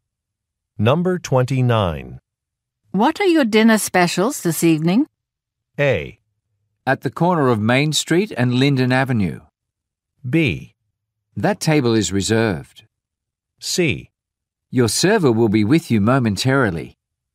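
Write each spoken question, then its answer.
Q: What are your dinner specials this evening?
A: C: Your server will be with you momentarily.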